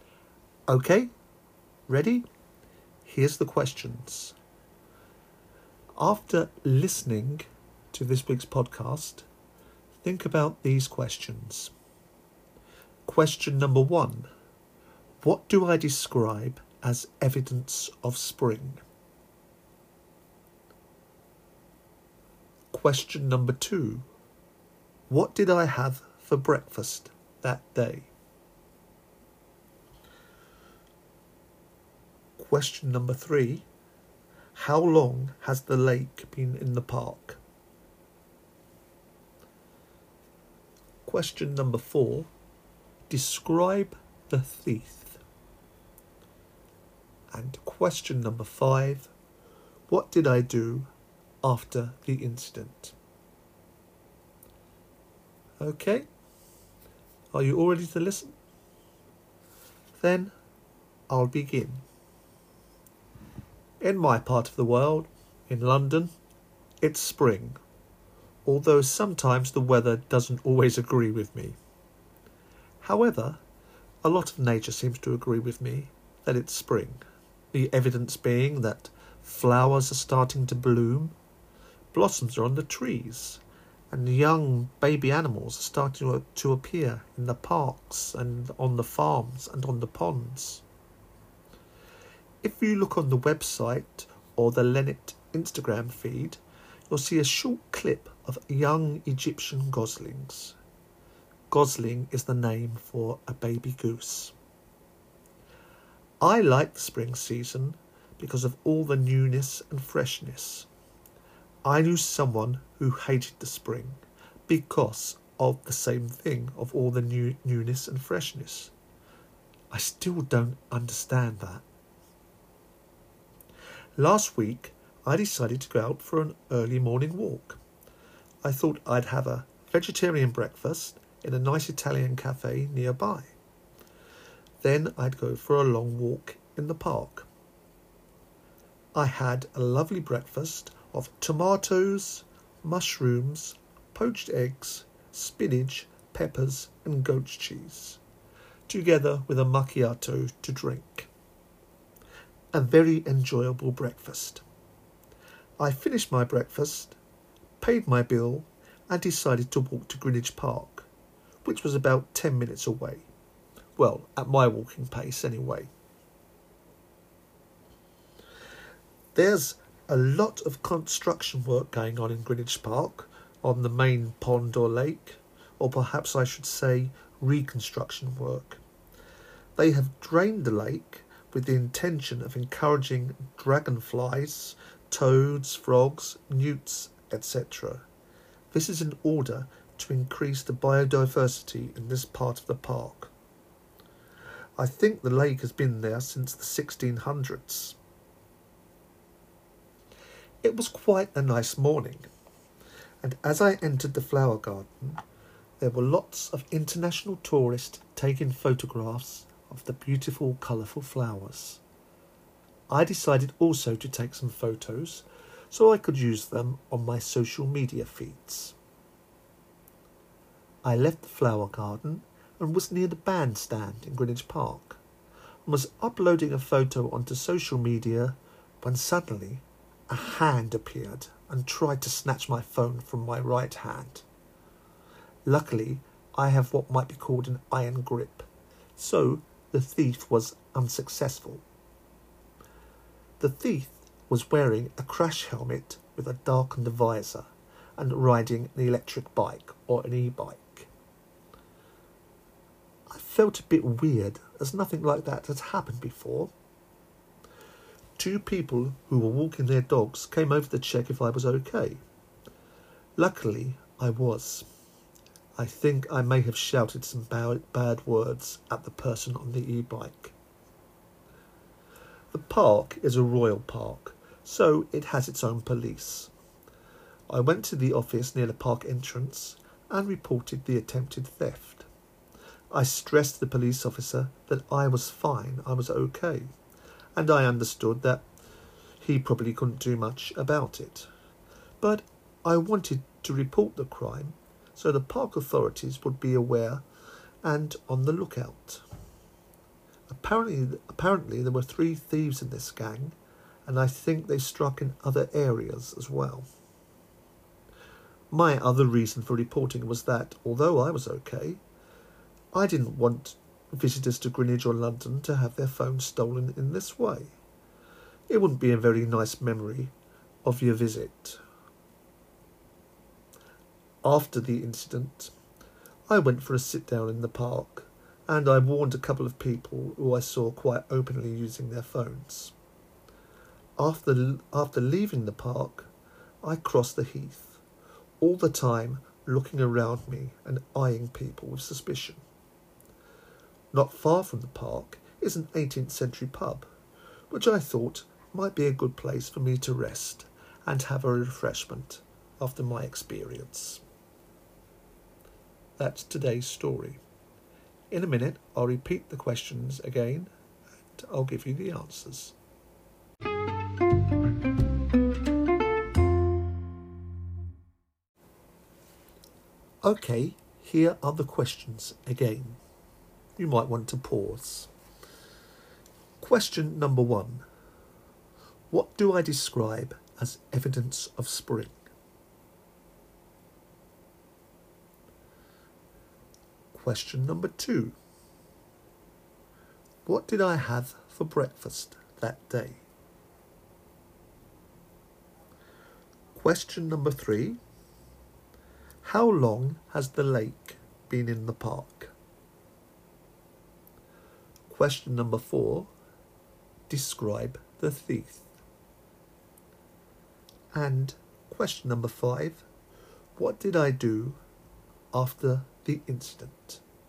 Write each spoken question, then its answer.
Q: what do I describe as evidence of spring?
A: I said the flowers are starting to bloom, blossoms are on the trees, and young animals are starting to appear in the parks and on the ponds.

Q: what did I have for breakfast that day?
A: I said I had a vegetarian breakfast, which consisted of tomatoes, mushrooms, poached eggs, spinach, peppers, and goat's cheese, together with a macchiato.

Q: how long has the lake been in the park?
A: I said the lake has been there since the 1600s.

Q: describe the thief.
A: I said the thief was wearing a crash helmet with a darkened visor and riding an electric bike or e-bike.

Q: what did I do after the incident?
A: I said that after the incident, I went for a sit-down in the park and warned a couple of people who I saw quite openly using their phones.